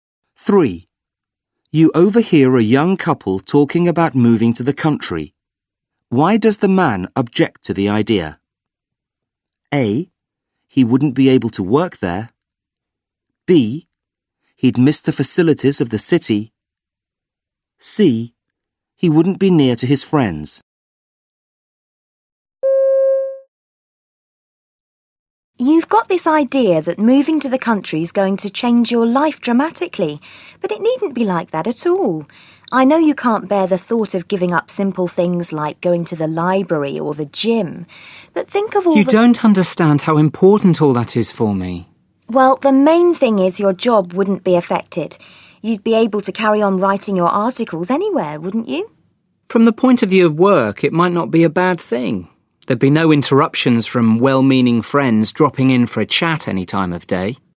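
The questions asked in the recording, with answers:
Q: Why does the man object to the idea?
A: B: He'd miss the facilities of the city.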